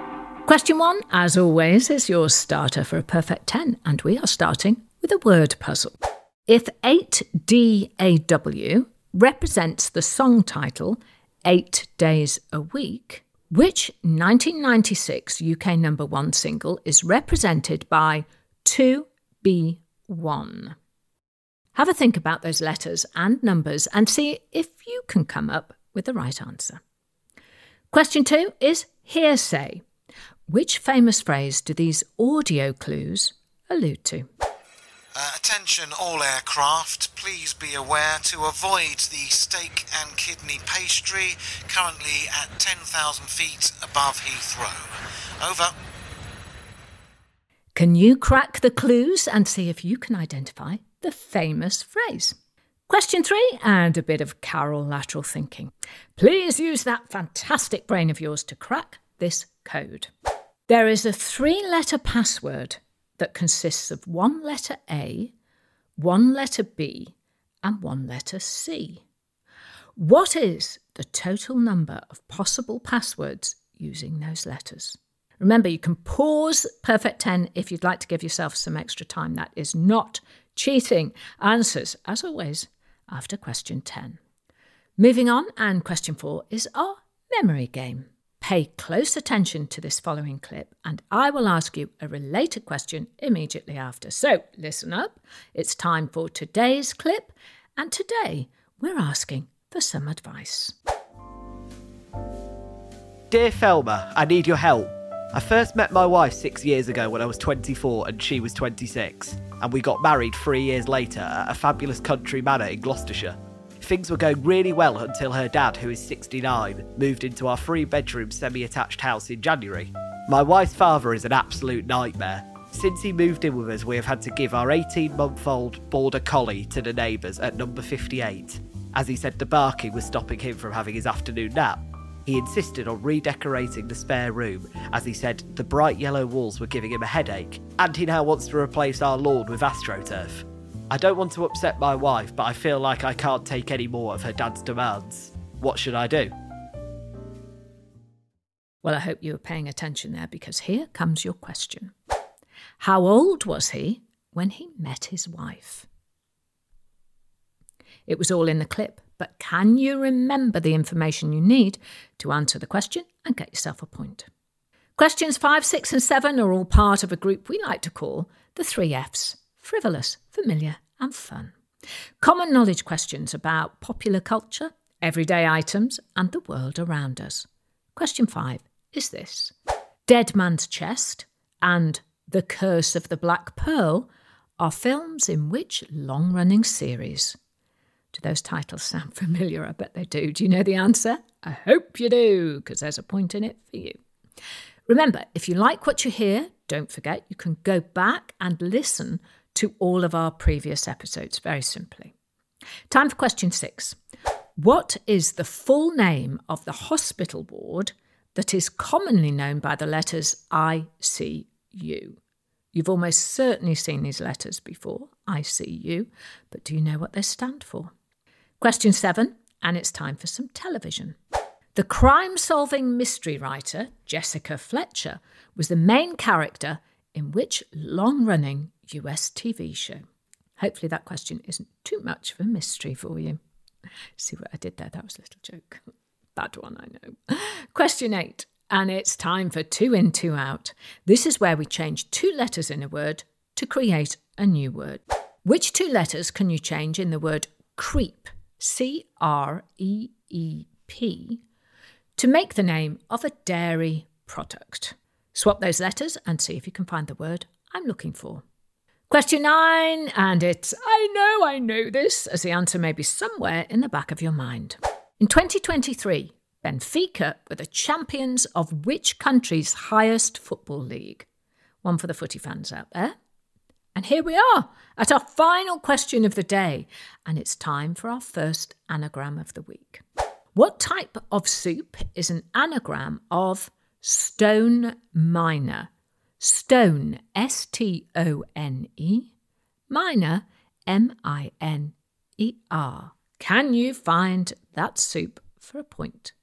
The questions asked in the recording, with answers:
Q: How old was he when he met his wife?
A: And the answer is, he was 24.